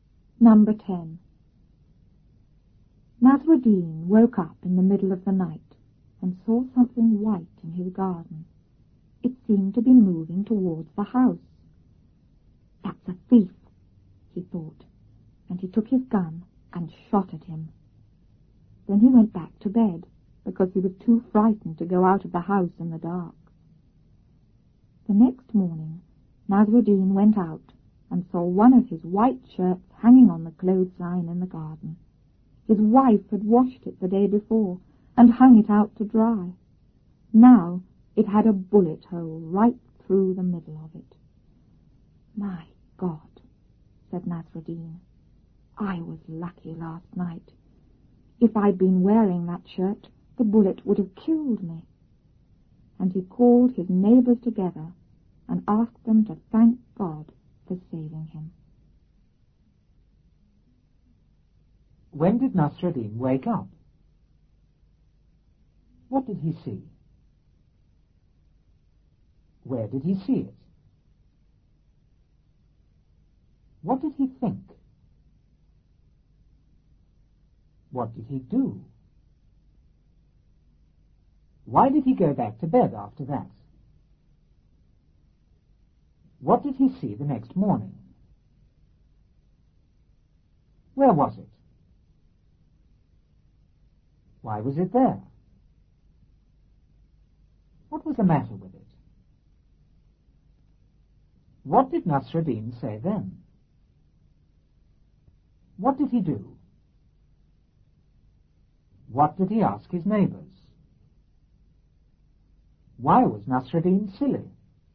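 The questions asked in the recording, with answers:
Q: When did Nasruddin wake up?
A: In the middle of the night

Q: What did he see?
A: Something white

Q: Where did he see it?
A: In his garden

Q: What did he think?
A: That it was a thief

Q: What did he do?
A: He took his gun and shot at it

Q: Why did he go back to bed after that?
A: He was too frightened to go out of the house in the dark

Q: What did he see the next morning?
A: One of his white shirts

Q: Where was it?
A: Hanging on the clothesline in the garden

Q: Why was it there?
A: His wife had washed it and hung it out to dry

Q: What was the matter with it?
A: It had a bullet hole right through the middle

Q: What did Nasruddin say then?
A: He was lucky; if he'd been wearing the shirt, the bullet would have killed him

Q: What did he do?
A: He called his neighbors together

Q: What did he ask his neighbors?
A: To thank God for saving him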